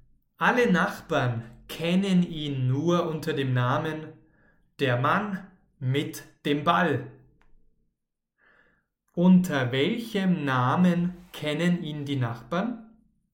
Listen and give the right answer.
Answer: Der Mann mit dem Ball. Unter diesem Namen kennen ihn die Nachbarn.